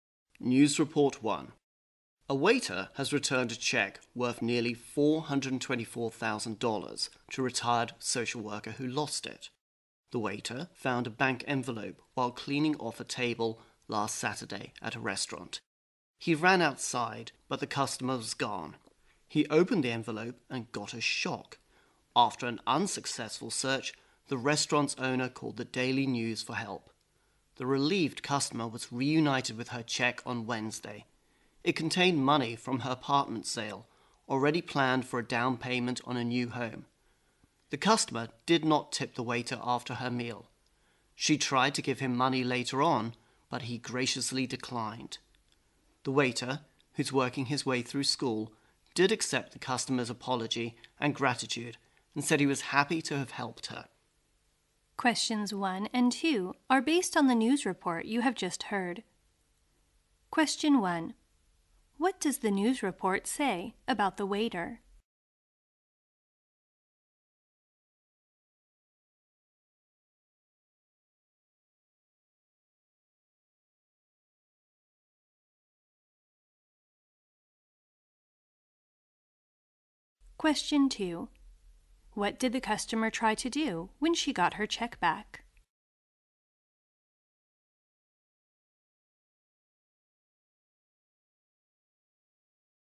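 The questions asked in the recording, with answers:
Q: What does the news report say about the waiter?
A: He returned a lost check worth nearly $424,000 to its owner

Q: What did the customer try to do when she got her check back?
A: Give the waiter some money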